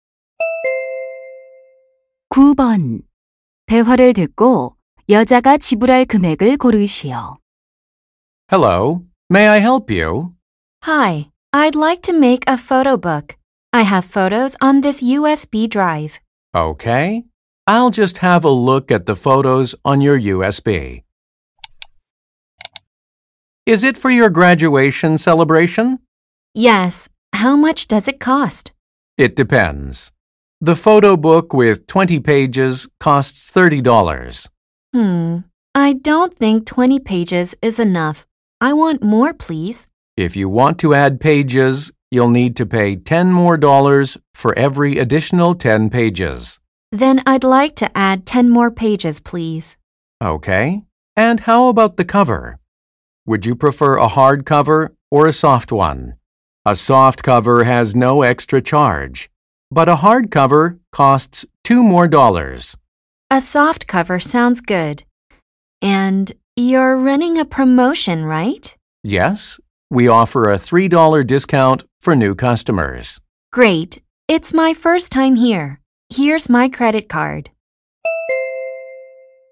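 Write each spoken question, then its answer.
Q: 대화를 듣고 여자가 지불할 금액을 고르시오.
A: $37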